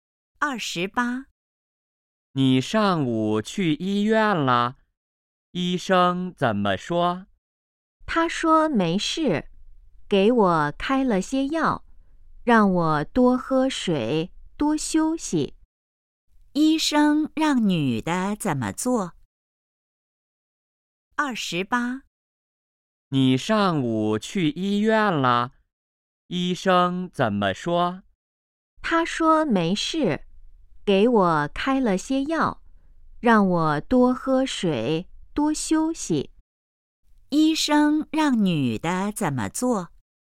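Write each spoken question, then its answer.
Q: 医生让女的怎么做?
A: 吃药,多喝水,多休息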